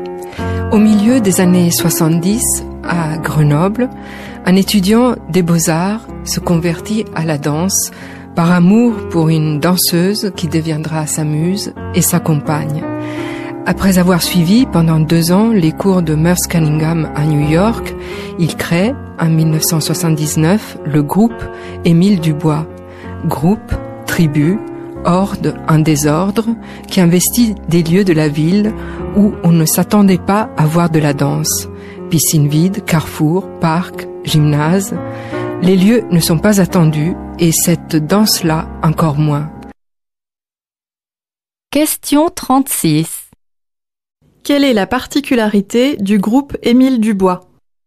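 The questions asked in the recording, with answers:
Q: Quelle est la particularité du groupe Émile Dubois ?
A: Il danse dans des lieux inattendus de la ville (piscine vide, carrefour, parc, gymnase).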